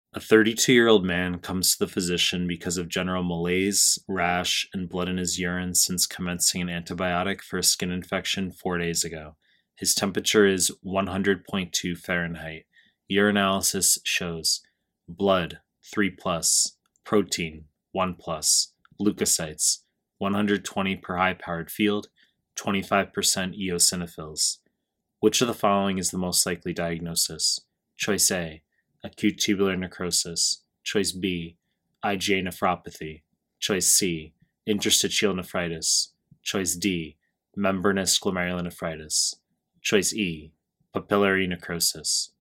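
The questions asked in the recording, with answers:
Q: Which of the following is the most likely diagnosis?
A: C: interstitial nephritis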